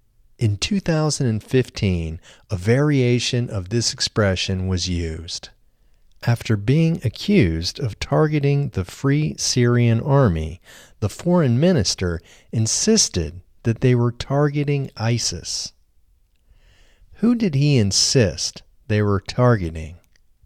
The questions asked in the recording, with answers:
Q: Who did he insist they were targeting?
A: He insisted they were targeting ISIS.